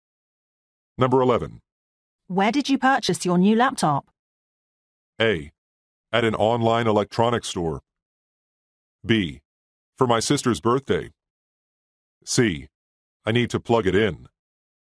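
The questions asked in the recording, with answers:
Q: Where did you purchase your new laptop?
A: A: At an online electronics store.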